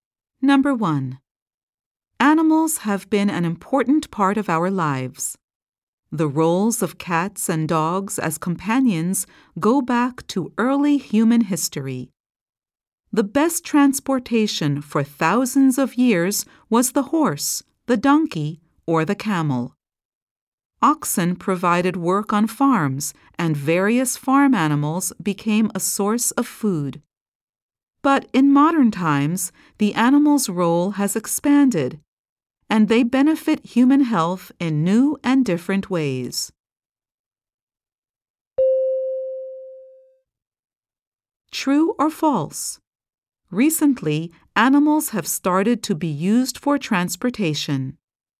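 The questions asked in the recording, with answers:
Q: True or false? Recently, animals have started to be used for transportation.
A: False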